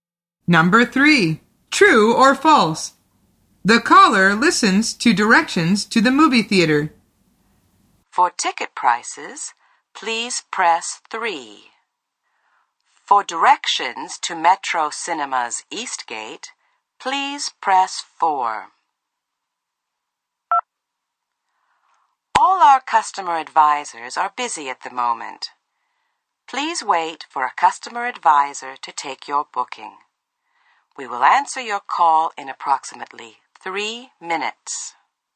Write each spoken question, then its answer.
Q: True or false? The caller listens to directions to the movie theater.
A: The answer is false. The woman says, for directions to Metro Cinema's East Gate, please press 4.